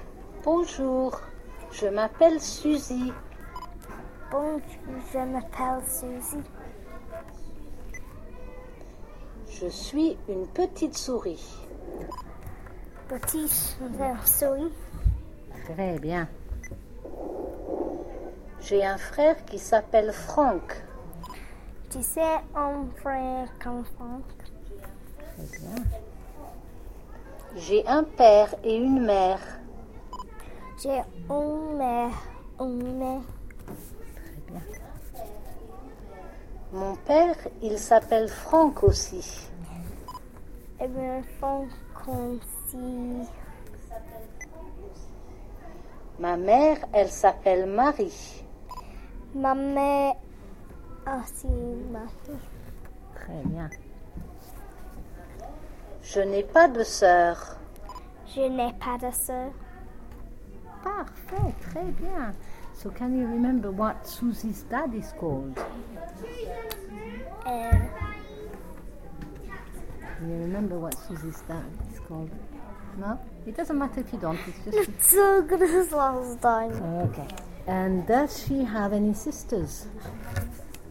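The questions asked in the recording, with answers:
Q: So, can you remember what Susie's dad is called?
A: Franck

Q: And does she have any sisters?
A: No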